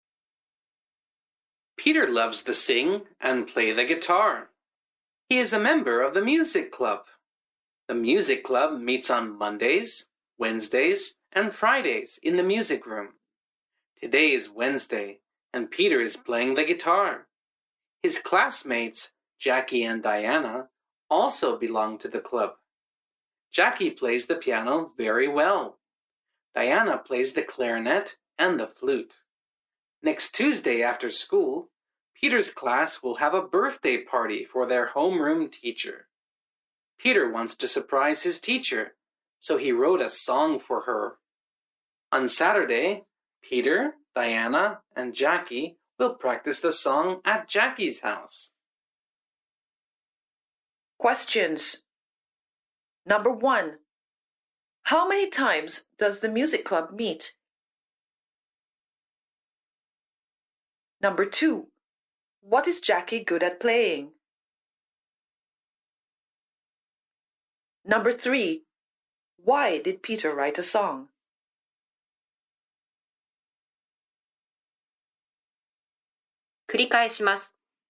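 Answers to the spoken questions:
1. Three times a week
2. The piano
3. To surprise his teacher for her birthday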